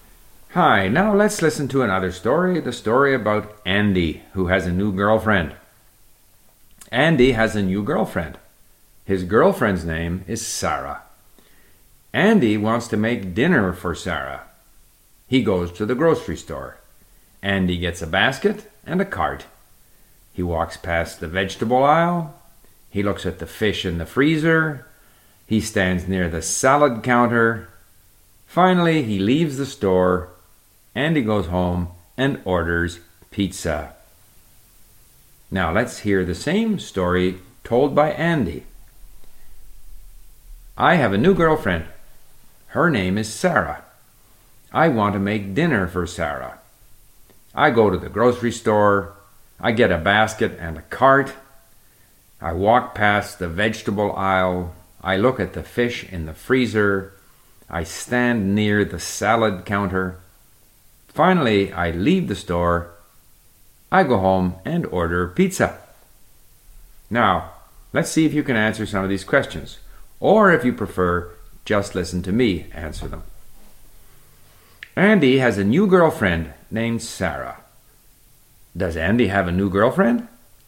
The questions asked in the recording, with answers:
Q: Does Andy have a new girlfriend?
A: Yes, Andy has a new girlfriend.